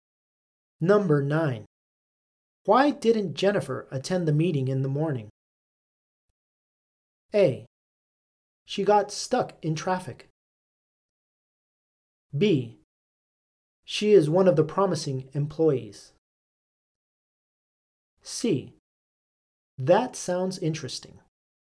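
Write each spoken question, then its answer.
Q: Why didn't Jennifer attend the meeting in the morning?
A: A: She got stuck in traffic.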